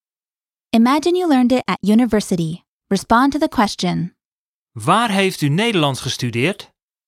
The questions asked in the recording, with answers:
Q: Waar heeft u Nederlands gestudeerd?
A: Ik heb het op de universiteit geleerd.